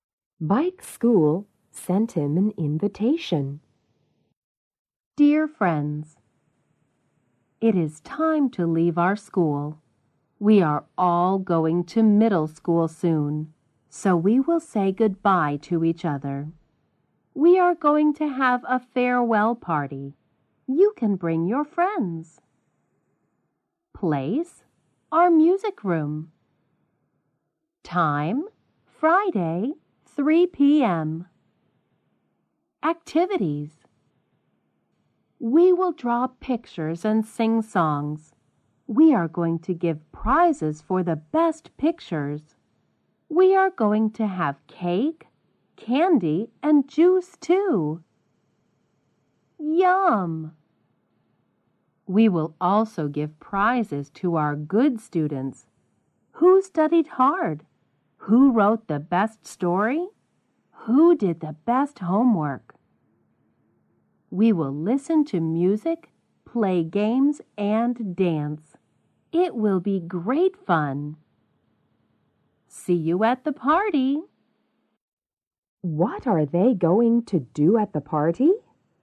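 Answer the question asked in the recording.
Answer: Draw pictures, sing songs, give prizes, eat cake, candy and juice, listen to music, play games and dance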